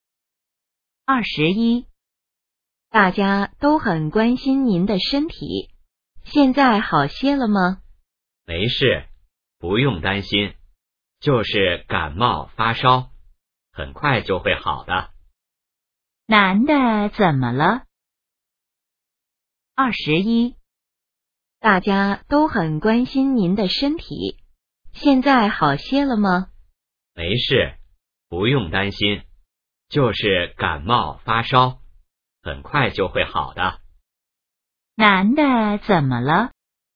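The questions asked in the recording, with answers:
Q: 男的怎么了?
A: 感冒发烧了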